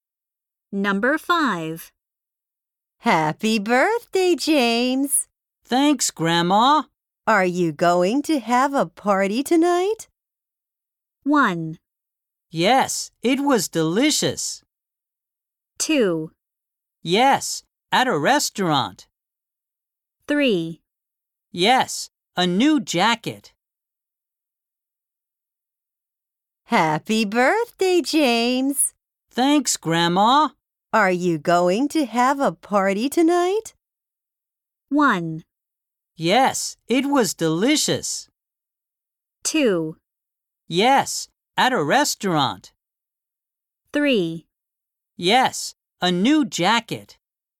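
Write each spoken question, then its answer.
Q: Are you going to have a party tonight?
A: 2: Yes, at a restaurant.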